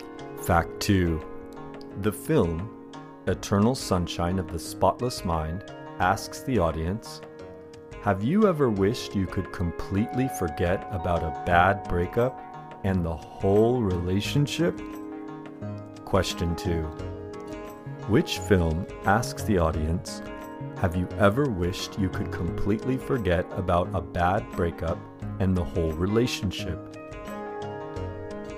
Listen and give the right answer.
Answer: The film Eternal Sunshine of the Spotless Mind asks the audience, have you ever wished you could completely forget about a bad breakup and the whole relationship?